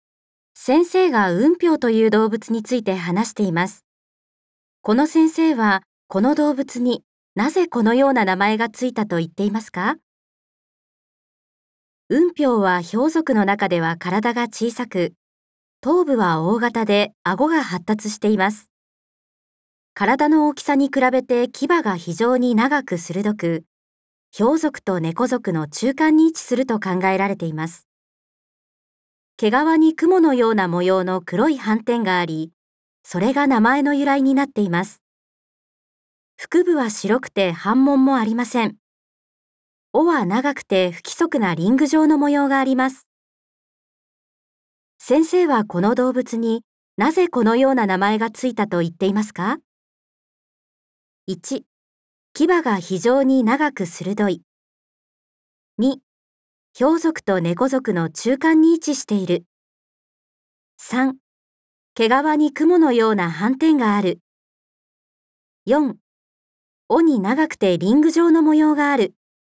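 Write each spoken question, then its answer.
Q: 先生はこの動物になぜこのような名前がついたと言っていますか?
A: 3: 毛皮に雲のような斑点がある。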